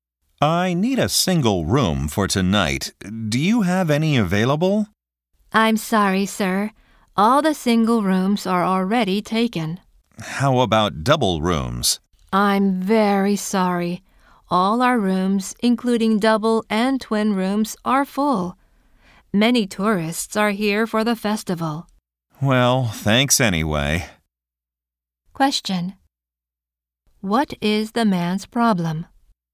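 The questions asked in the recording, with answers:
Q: What is the man's problem?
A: He can't get a room because the hotel is full.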